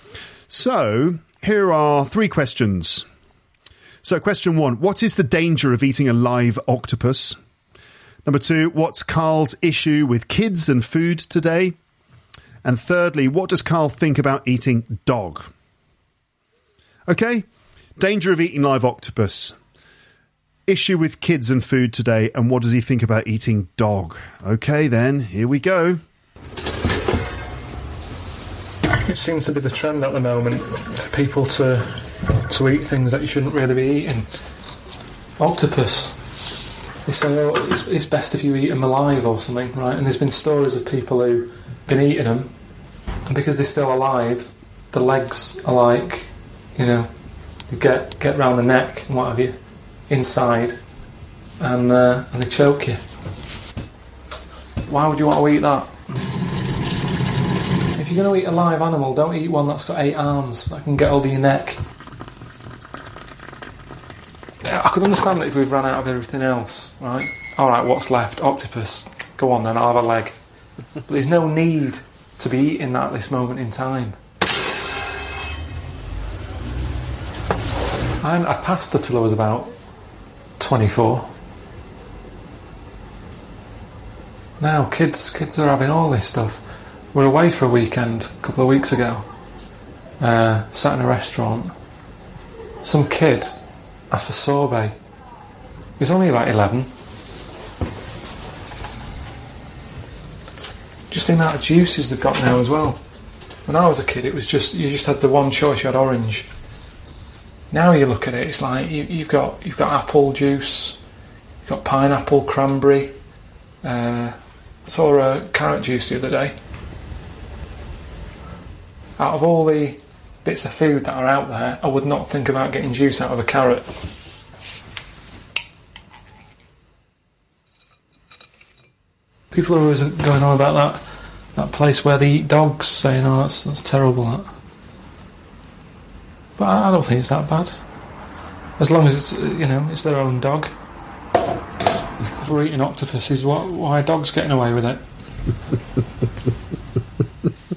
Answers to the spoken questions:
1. the danger of eating a live octopus, according to Carl, is that its legs can choke you.
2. his issue with kids and food today is that kids have far too much choice and they're spoiled basically with their food choices.
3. Well, he doesn't have a problem with it as long as people eat their own dogs.